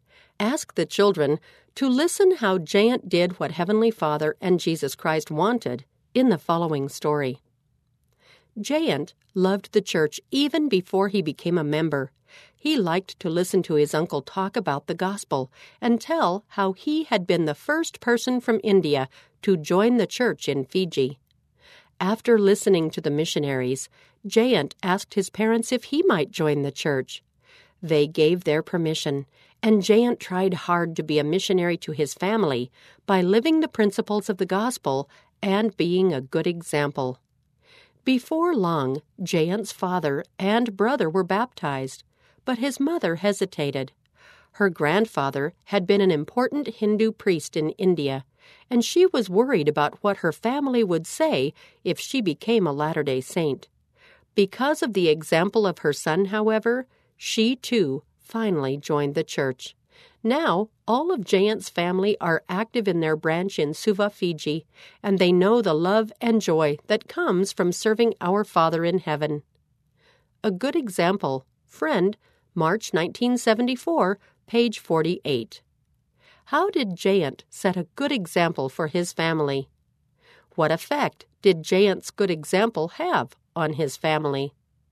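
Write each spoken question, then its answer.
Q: How did Jayant set a good example for his family?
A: He lived the principles of the gospel and was a missionary to his family

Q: What effect did Jayant's good example have on his family?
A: His whole family joined the church and are active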